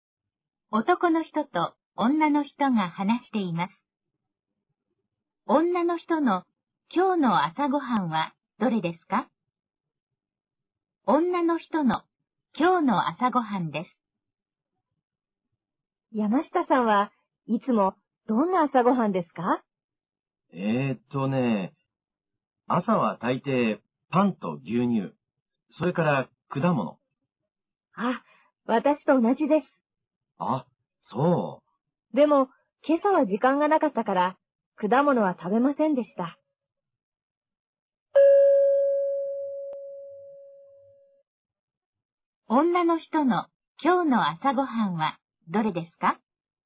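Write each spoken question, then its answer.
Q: 女の人の今日の朝ごはんはどれですか?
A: パンと牛乳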